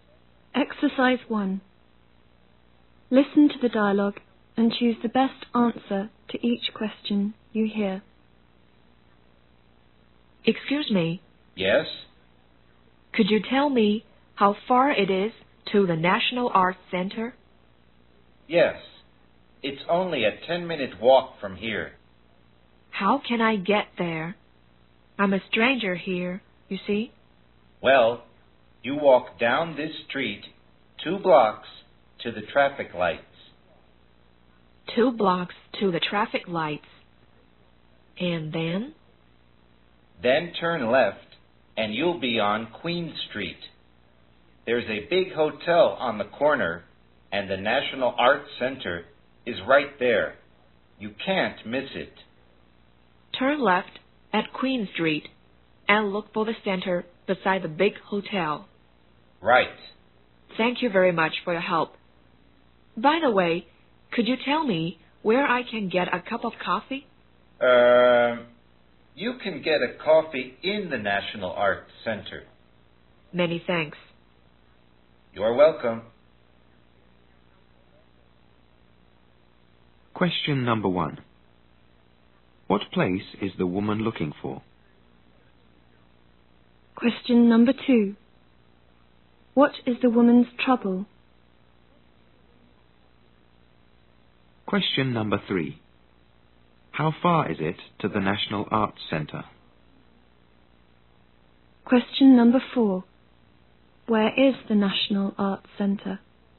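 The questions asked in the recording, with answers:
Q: What place is the woman looking for?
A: The National Arts Center

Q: What is the woman's trouble?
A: She is a stranger there and doesn't know the way

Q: How far is it to the National Arts Center?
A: A 10-minute walk

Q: Where is the National Arts Center?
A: On Queen Street, beside the big hotel on the corner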